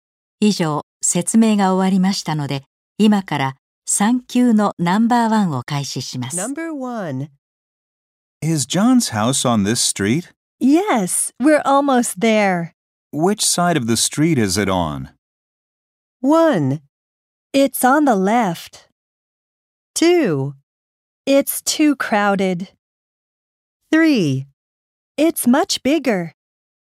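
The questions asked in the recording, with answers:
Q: Which side of the street is it on?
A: 1: It's on the left.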